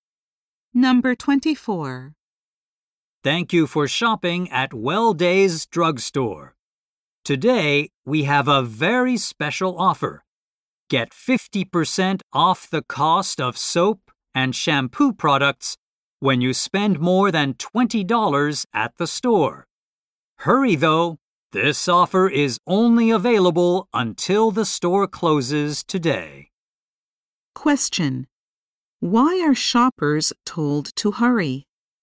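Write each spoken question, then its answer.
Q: Why are shoppers told to hurry?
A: The special offer is only available until the store closes today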